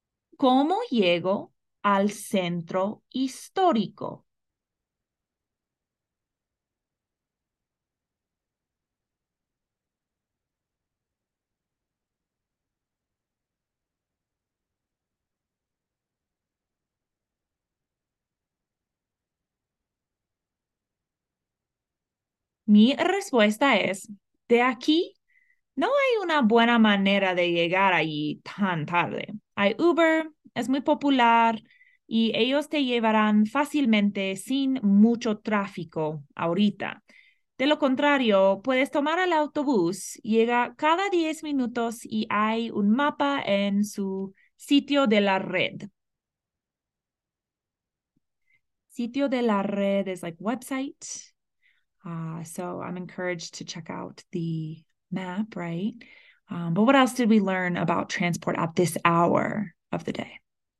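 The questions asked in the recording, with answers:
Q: Um, but what else did we learn about transport at this hour of the day?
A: It's late, so there's no good way to get there; Uber is easy with little traffic now, and the bus comes every 10 minutes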